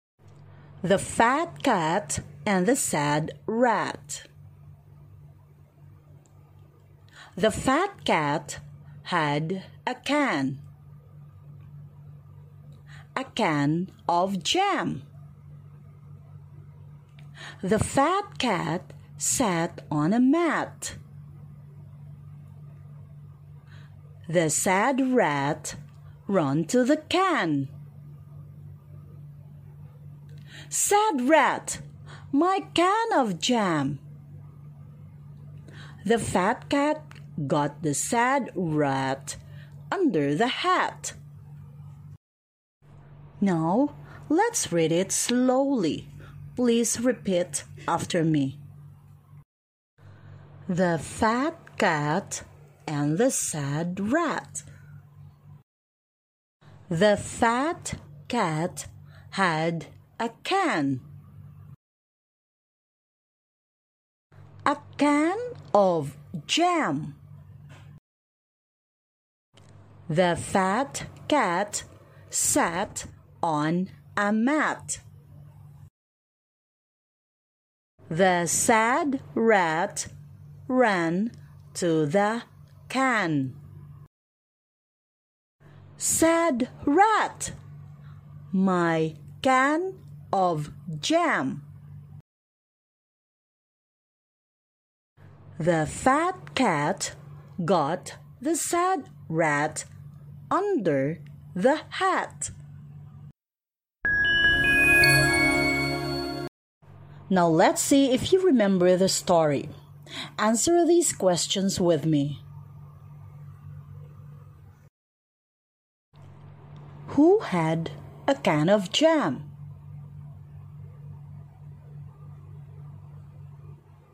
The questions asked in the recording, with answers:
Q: Who had a can of jam?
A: That's right! The fat cat had a can of jam.